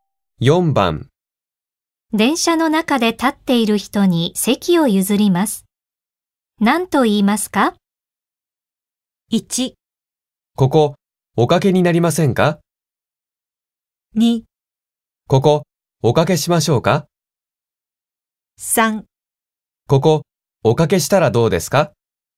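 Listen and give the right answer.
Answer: 1: ここおかけになりませんか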